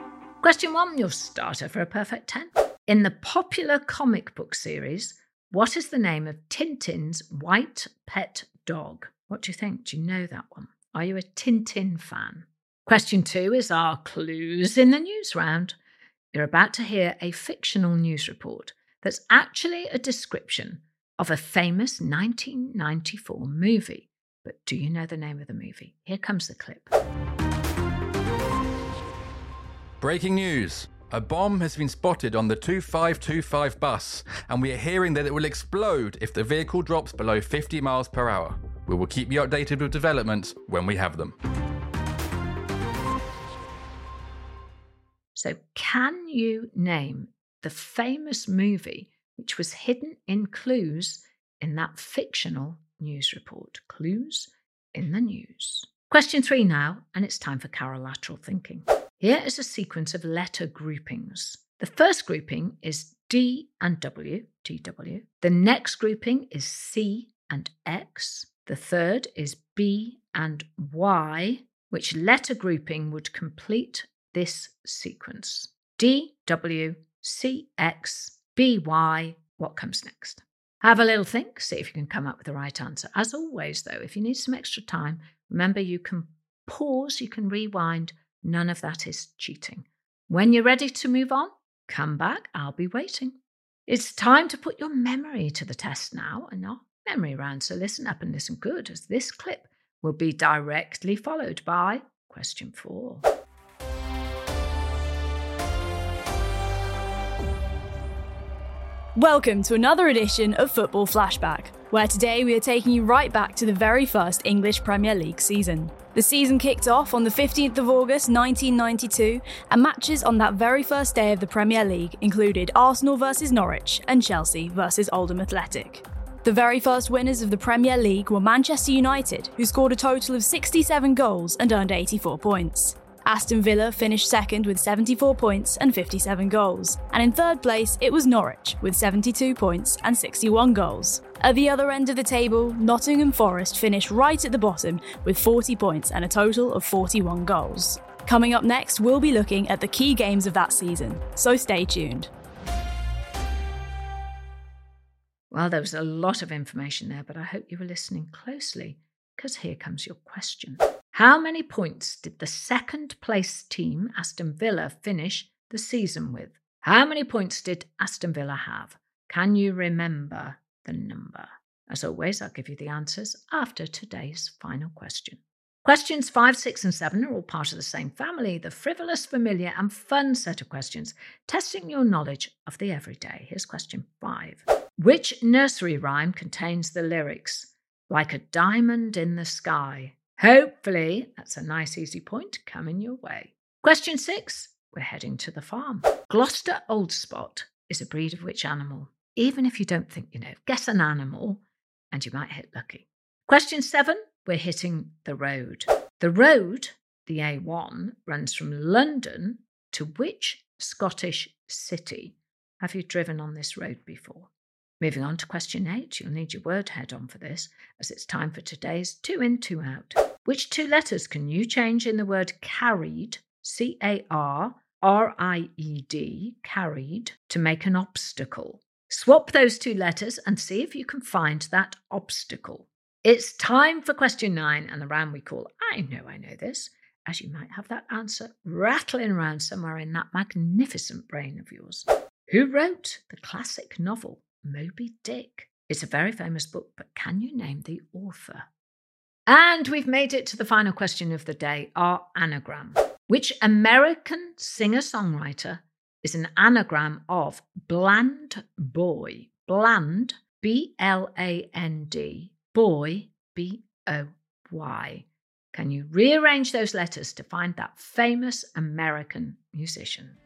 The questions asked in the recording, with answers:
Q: Which letter grouping would complete this sequence?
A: And the answer is the grouping A and Z.

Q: How many points did the second place team, Aston Villa, finish the season with?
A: The answer is 74 points.

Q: Which two letters can you change in the word carried, C-A-R-R-I-E-D, carried, to make an obstacle?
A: Well, if you change the C to a B and the D to an R, you get a barrier, B-A-R-R-I-E-R.